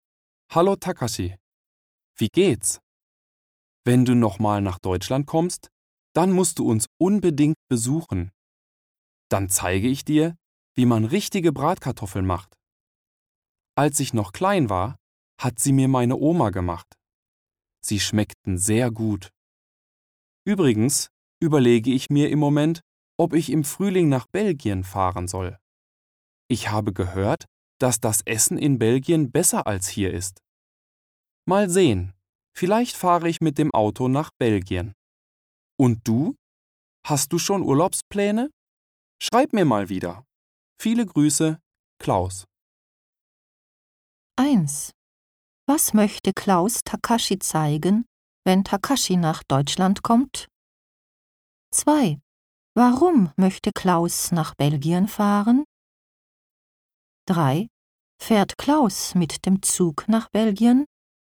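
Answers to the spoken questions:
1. Wie man richtige Bratkartoffeln macht.
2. Weil das Essen in Belgien besser sein soll.
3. Nein, vielleicht fährt er mit dem Auto.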